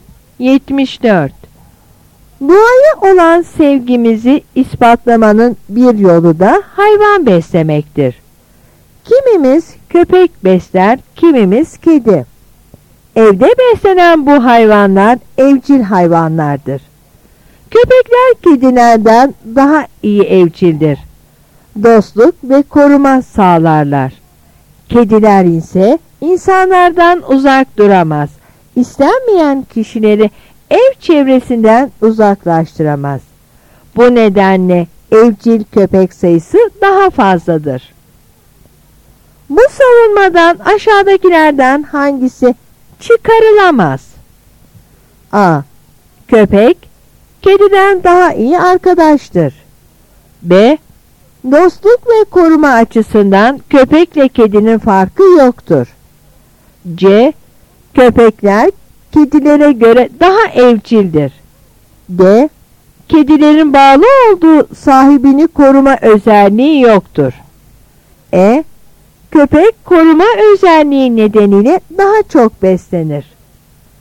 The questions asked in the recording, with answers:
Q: Bu savunmadan aşağıdakilerden hangisi çıkarılamaz?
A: Yanıt B.